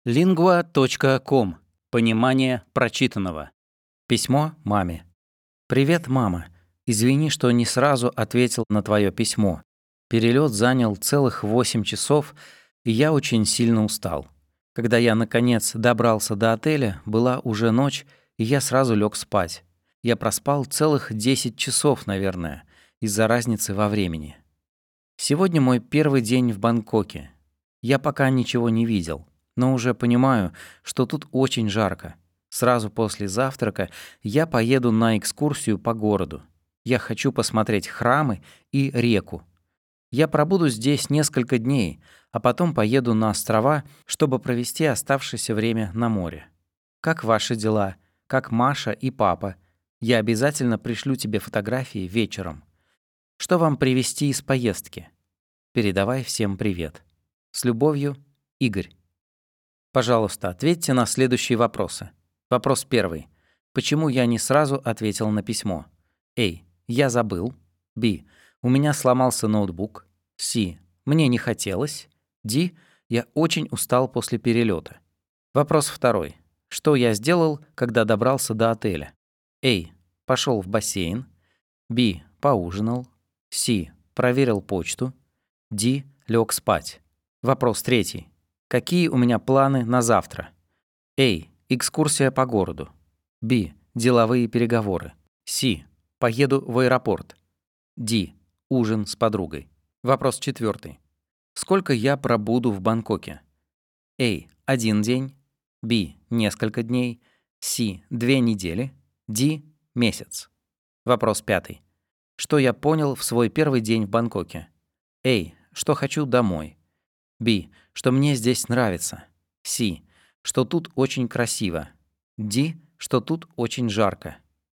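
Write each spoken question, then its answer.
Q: Почему я не сразу ответил на письмо?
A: D: Я очень устал после перелета.

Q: Что я сделал, когда добрался до отеля?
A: D: Лег спать.

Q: Сколько я пробуду в Бангкоке?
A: B: Несколько дней.

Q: Что я понял в свой первый день в Бангкоке?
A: D: Что тут очень жарко.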